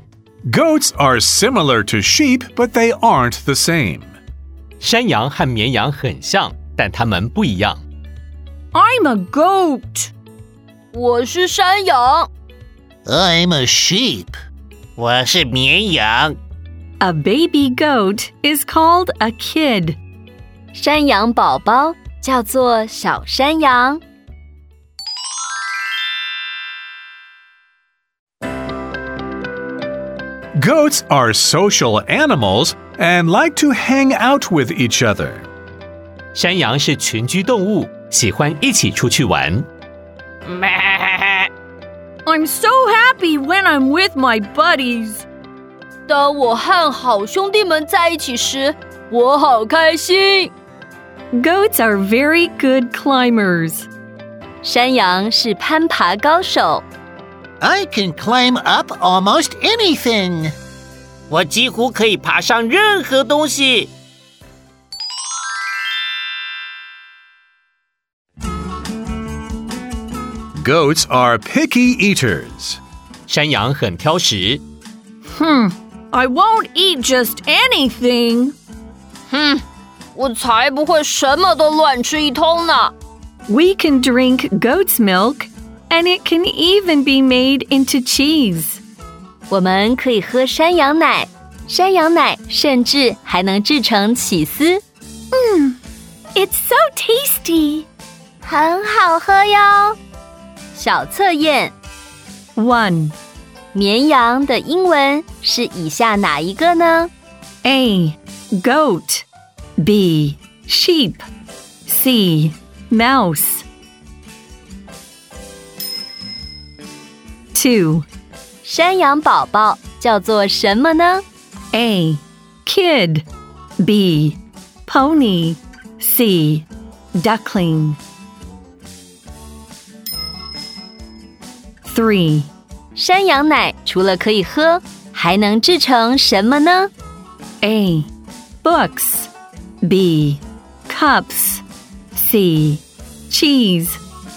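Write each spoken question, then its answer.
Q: 绵羊的英文是以下哪一个呢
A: B: Sheep

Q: 山羊宝宝叫做什么呢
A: A: Kid

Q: 山羊奶除了可以喝还能制成什么呢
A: C: Cheese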